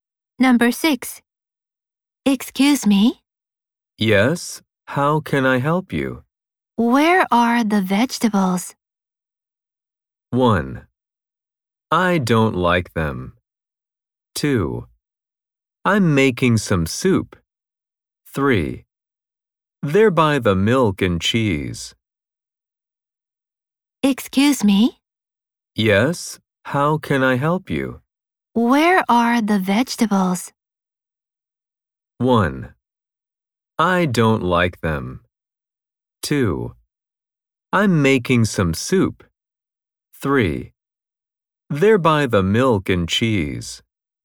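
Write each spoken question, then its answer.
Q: Where are the vegetables?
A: 3: They're by the milk and cheese.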